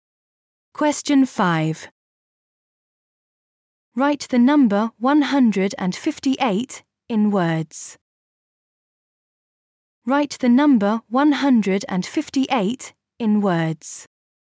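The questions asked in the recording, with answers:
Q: Write the number 158 in words.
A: one hundred and fifty-eight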